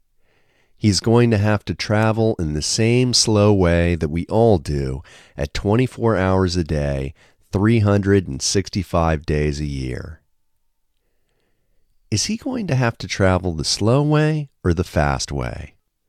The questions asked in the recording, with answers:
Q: Is he going to have to travel the slow way or the fast way?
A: He is going to have to travel the slow way.